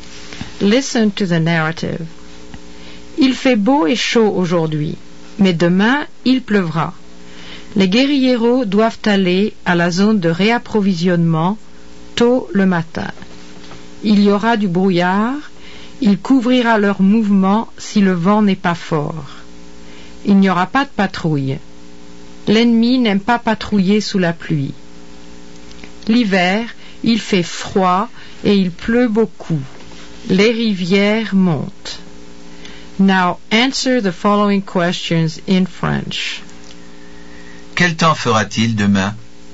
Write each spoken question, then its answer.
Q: Quel temps fera-t-il demain?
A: Il va pleuvoir demain, or il pleuvra demain.